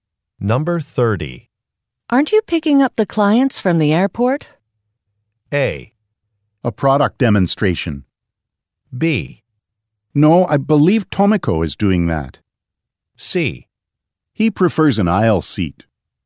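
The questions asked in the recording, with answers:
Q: Aren't you picking up the clients from the airport?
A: B: No, I believe Tomiko is doing that.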